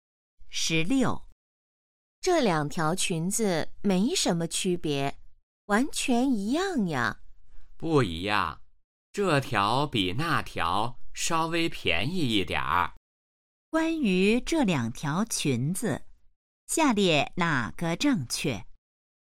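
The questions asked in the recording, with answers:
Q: 关于这两条裙子,下列哪个正确?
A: 一条比另一条稍微便宜一点儿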